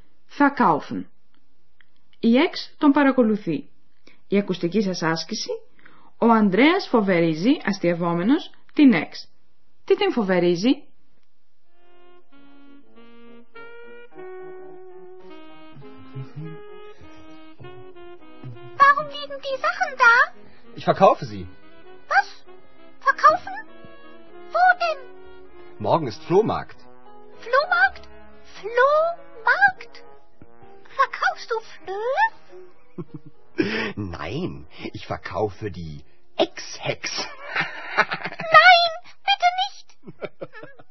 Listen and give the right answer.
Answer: Ο Ανδρέας φοβερίζει την Εξ πως θα την πουλήσει και αυτήν όπως και τα παλιοπράγματά του.